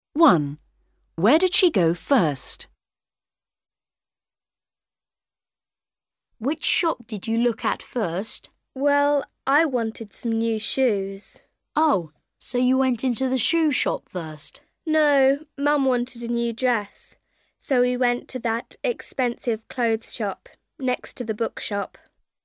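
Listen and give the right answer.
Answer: the clothes shop next to the bookshop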